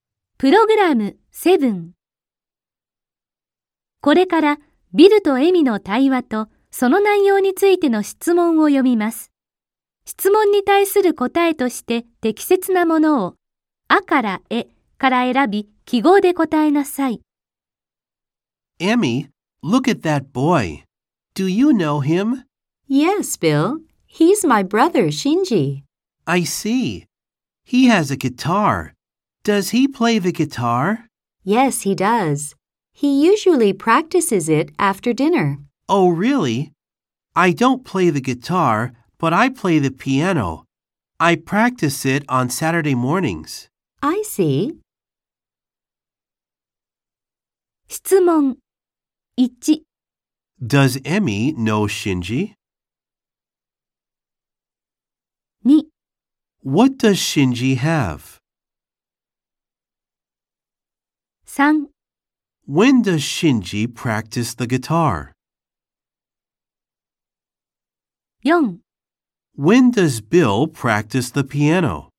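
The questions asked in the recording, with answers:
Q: Does Emmy know Shinji?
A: Yes, she does.

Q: What does Shinji have?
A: A guitar.

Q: When does Shinji practice the guitar?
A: Usually after dinner.

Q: When does Bill practice the piano?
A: On Saturday mornings.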